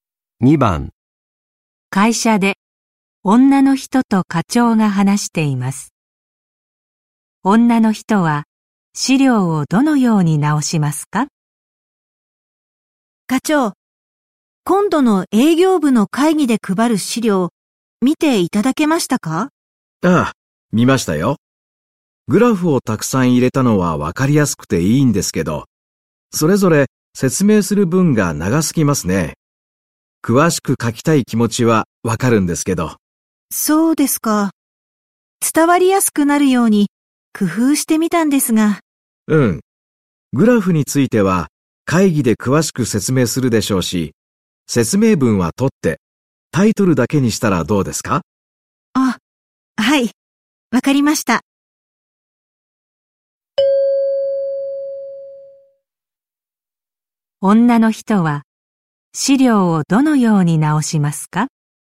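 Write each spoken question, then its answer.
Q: 女の人は資料をどのように直しますか?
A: グラフの説明文を取って、タイトルだけにする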